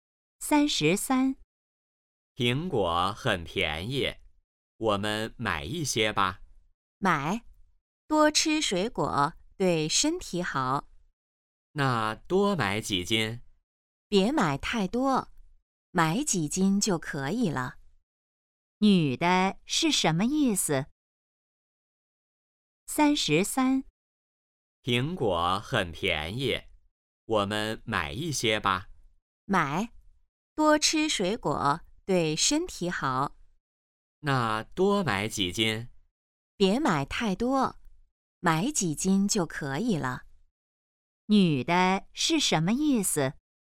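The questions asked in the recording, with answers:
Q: 女的是什么意思?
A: 别买太多,买几斤就可以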